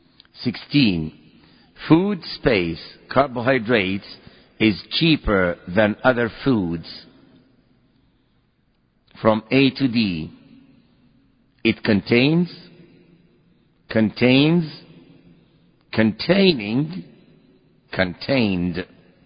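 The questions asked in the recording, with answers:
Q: Food, space, carbohydrates is cheaper than other foods.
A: C: containing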